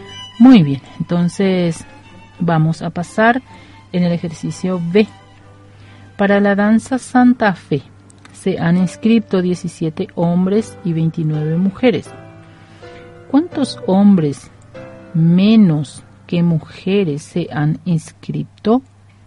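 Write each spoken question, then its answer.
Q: ¿Cuántos hombres menos que mujeres se han inscrito?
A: 12 hombres menos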